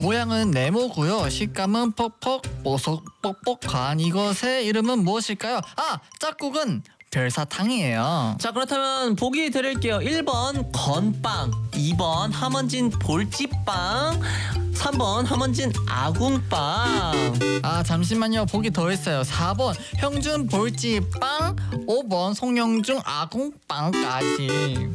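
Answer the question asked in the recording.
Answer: 1: 건빵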